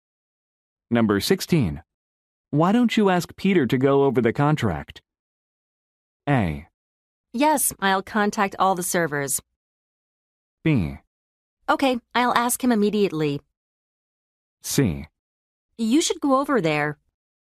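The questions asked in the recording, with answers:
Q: Why don't you ask Peter to go over the contract?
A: B: Okay, I'll ask him immediately.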